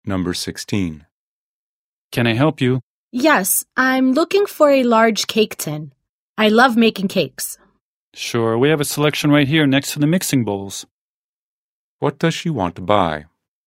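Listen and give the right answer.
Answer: A large cake tin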